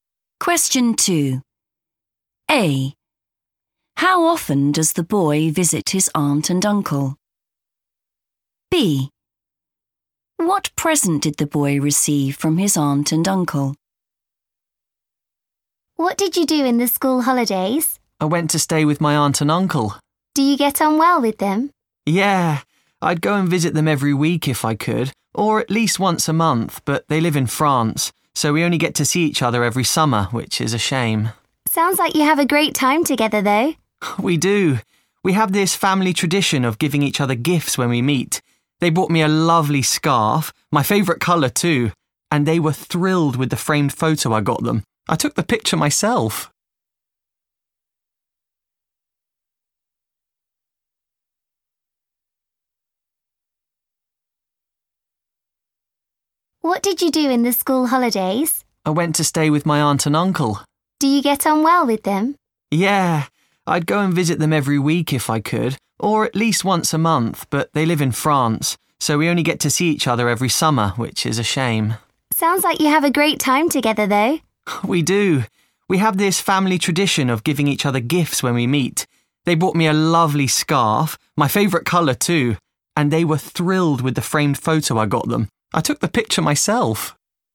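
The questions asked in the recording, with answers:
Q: How often does the boy visit his aunt and uncle?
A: every summer

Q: What present did the boy receive from his aunt and uncle?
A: a scarf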